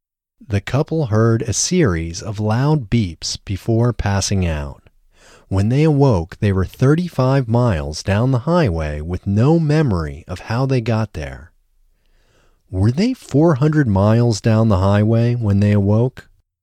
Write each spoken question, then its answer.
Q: Were they 400 miles down the highway when they awoke?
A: No, they weren't 400 miles down the highway when they awoke.